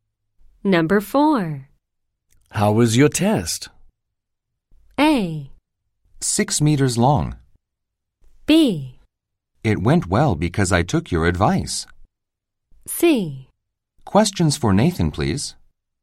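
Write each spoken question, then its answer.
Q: How was your test?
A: B: It went well because I took your advice.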